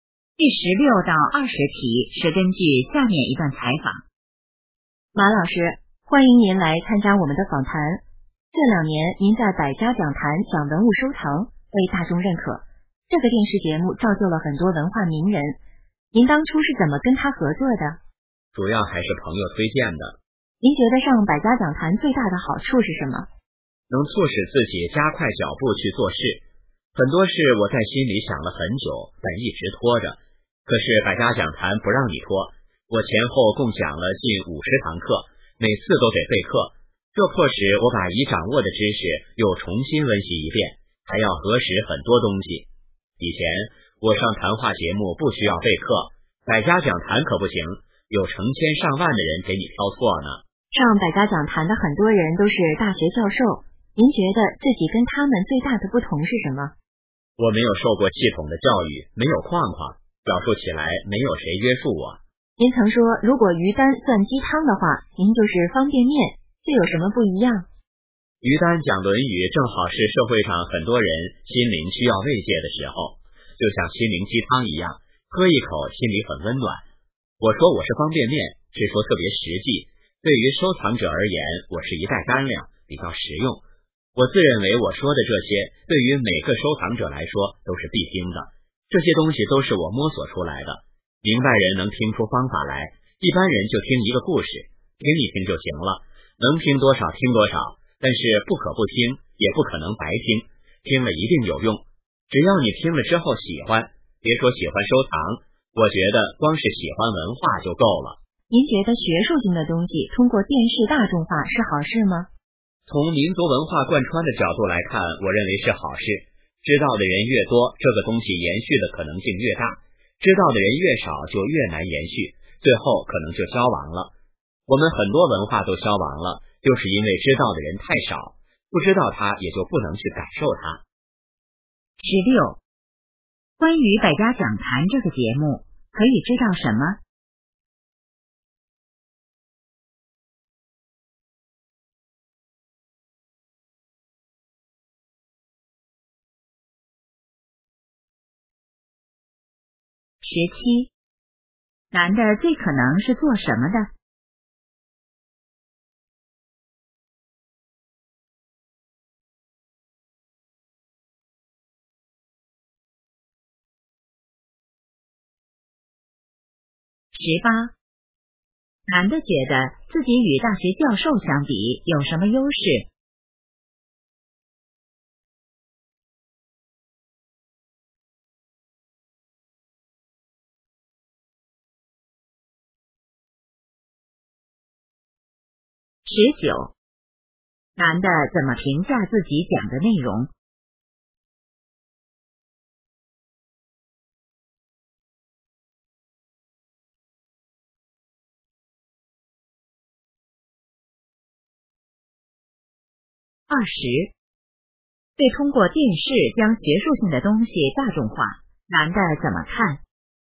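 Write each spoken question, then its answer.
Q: 男的最可能是做什么的?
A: 文物收藏专家

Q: 男的觉得自己与大学教授相比有什么优势?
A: 没有框框,表述不受约束

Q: 男的怎么评价自己讲的内容?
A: 特别实际、实用

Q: 对通过电视将学术性的东西大众化,男的怎么看?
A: 是好事,有利于文化延续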